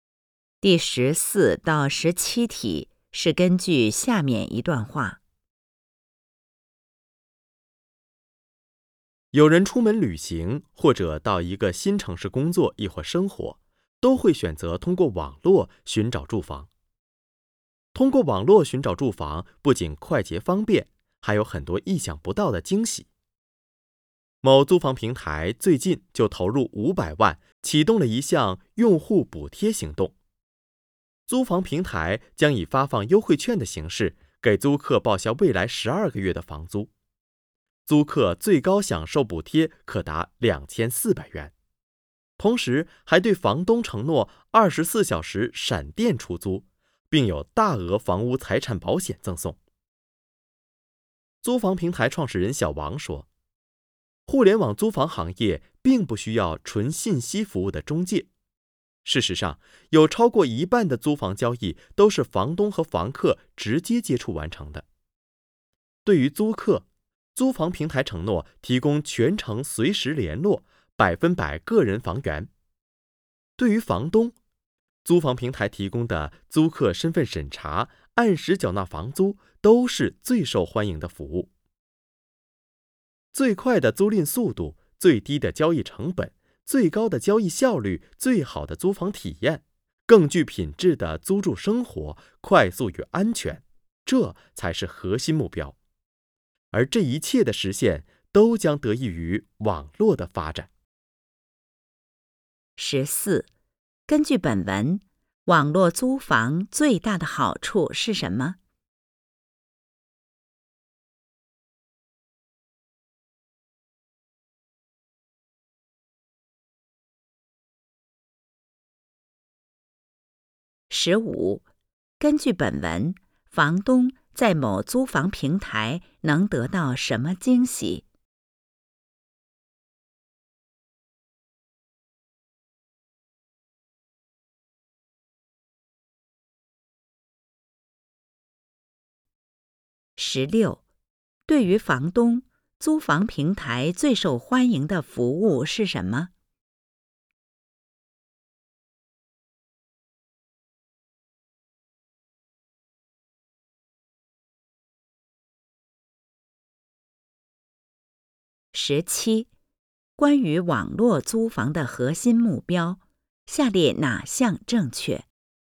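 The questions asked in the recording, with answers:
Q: 根据本文,房东在某租房平台能得到什么惊喜?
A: 24小时闪电出租,并有大额房屋财产保险赠送

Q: 对于房东,租房平台最受欢迎的服务是什么?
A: 租客身份审查、按时缴纳房租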